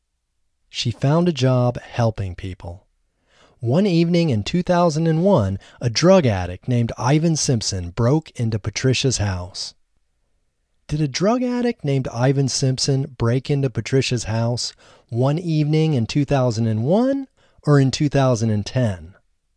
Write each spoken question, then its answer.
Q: Did a drug addict named Ivan Simpson break into Patricia's house one evening in 2001 or in 2010?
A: A drug addict named Ivan Simpson broke into Patricia's house one evening in 2001.